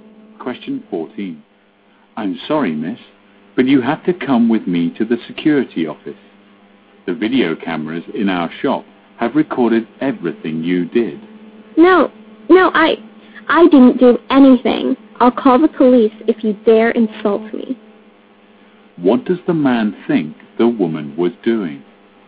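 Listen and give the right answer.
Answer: Stealing from the shop (shoplifting).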